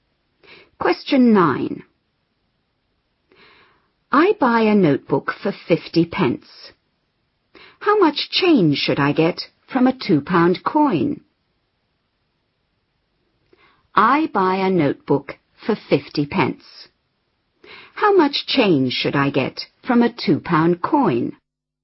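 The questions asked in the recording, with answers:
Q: How much change should I get from a £2 coin?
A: £1.50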